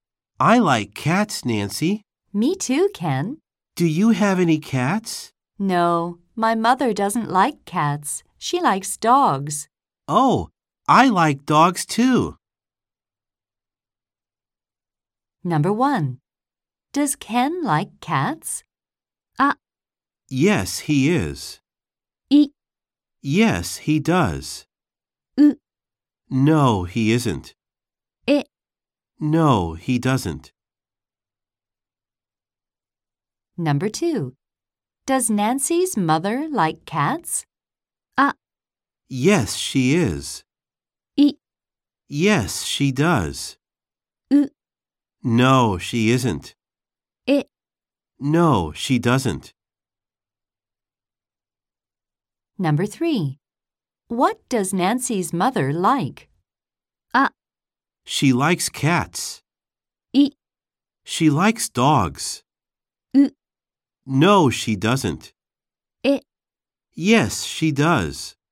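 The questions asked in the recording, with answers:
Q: Does Ken like cats?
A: B: Yes, he does.

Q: Does Nancy's mother like cats?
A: D: No, she doesn't.

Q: What does Nancy's mother like?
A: B: She likes dogs.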